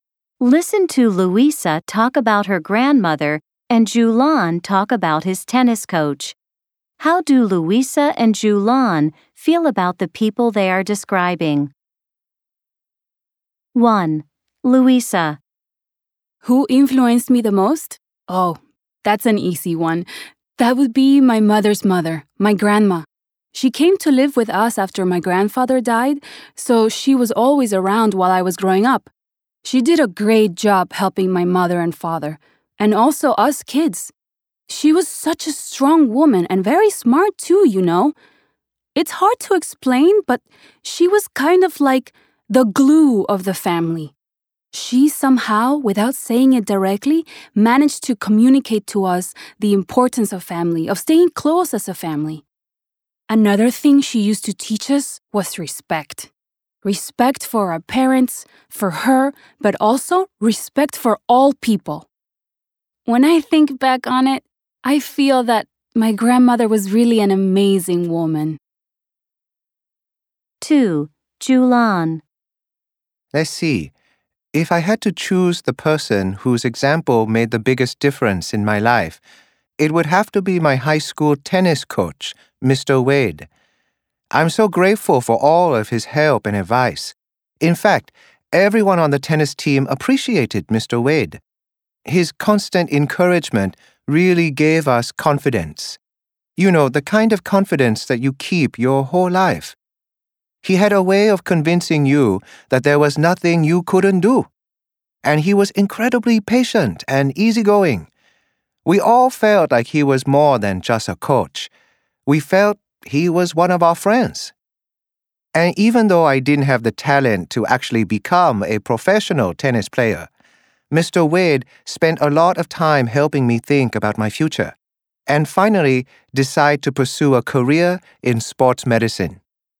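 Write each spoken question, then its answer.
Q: How do Luisa and Julian feel about the people they are describing?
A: Luisa thinks her grandmother was an amazing woman

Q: How do Luisa and Julian feel about the people they are describing?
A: Julian is grateful to his coach Mr. Wade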